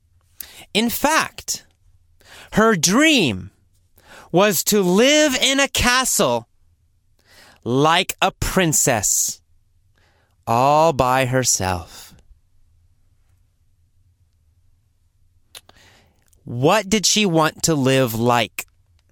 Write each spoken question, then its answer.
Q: What did she want to live like?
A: Like a princess. She wanted to live like a princess.